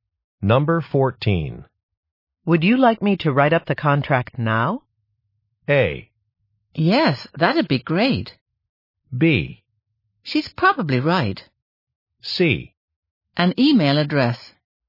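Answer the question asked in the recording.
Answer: A: Yes, that'd be great.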